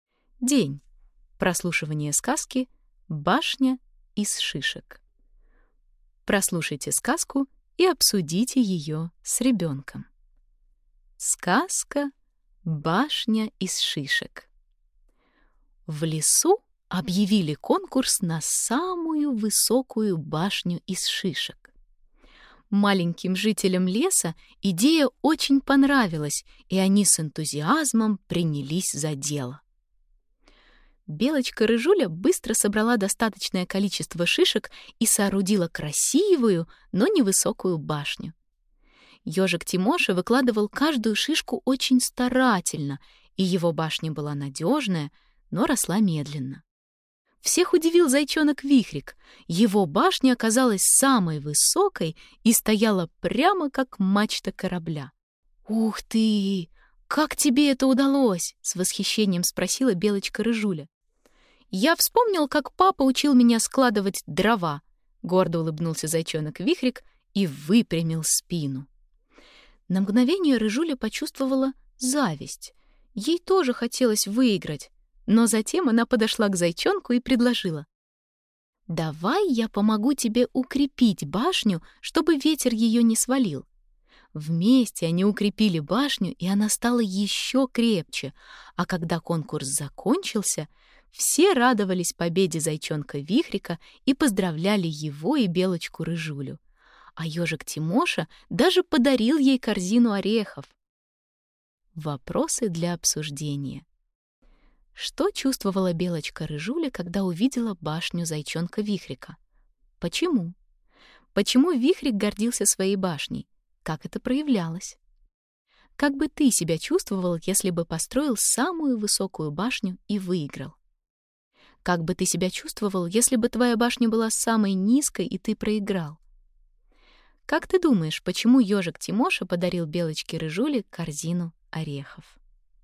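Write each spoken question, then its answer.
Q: Что чувствовала Белочка-рыжуля, когда увидела башню зайчонка Вихрика?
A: Зависть

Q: Почему Вихрик гордился своей башней?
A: Его башня оказалась самой высокой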